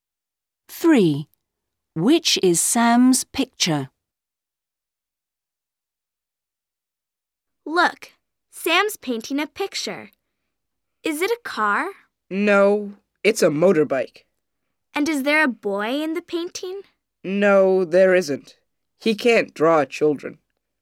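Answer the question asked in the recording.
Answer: A motorbike with no boy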